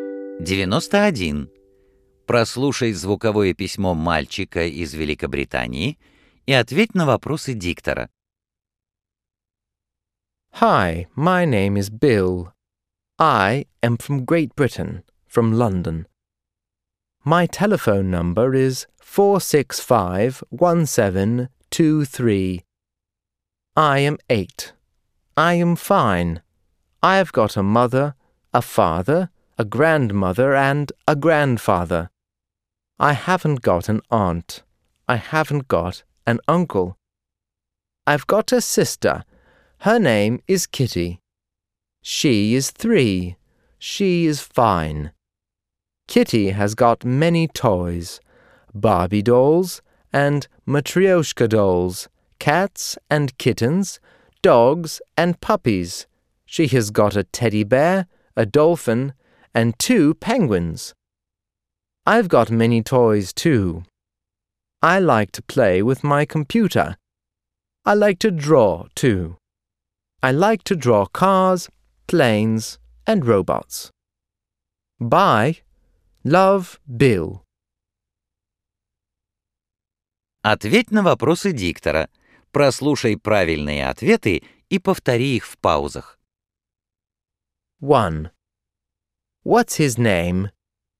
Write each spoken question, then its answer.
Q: What's his name?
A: His name is Bill.